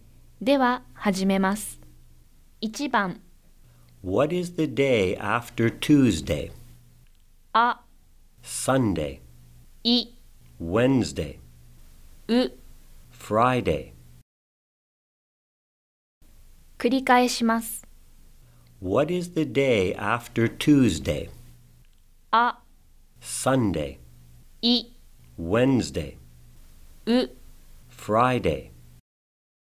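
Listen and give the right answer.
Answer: I: Wednesday.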